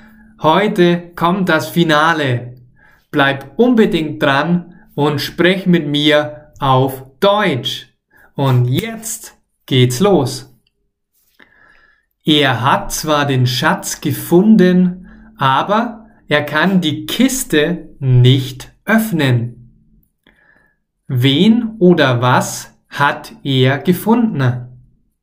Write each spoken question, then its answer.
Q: Wen oder was hat er gefunden?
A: den Schatz. Er hat den Schatz gefunden.